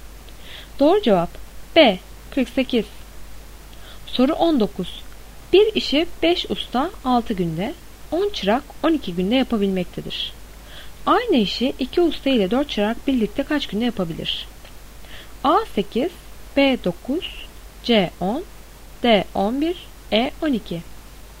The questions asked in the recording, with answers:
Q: Aynı işi 2 usta ile 4 çırak birlikte kaç günde yapabilir?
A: Doğru cevap C 10.